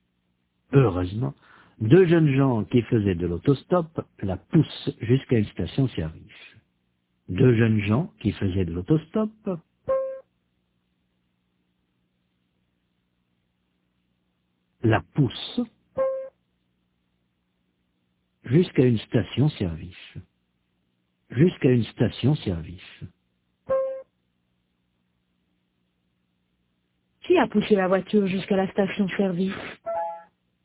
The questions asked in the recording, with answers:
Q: Qui a poussé la voiture jusqu'à la station-service ?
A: Deux jeunes gens qui faisaient de l'autostop.